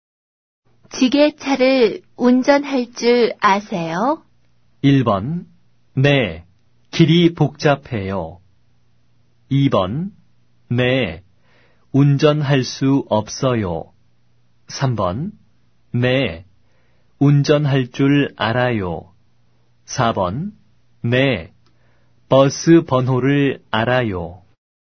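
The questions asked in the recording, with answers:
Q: 기계차를 운전할 줄 아세요?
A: 3: 네, 운전할 줄 알아요.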